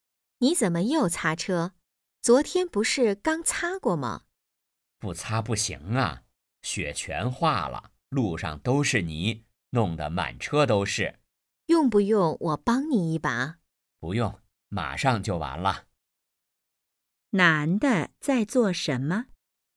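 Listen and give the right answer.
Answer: 擦车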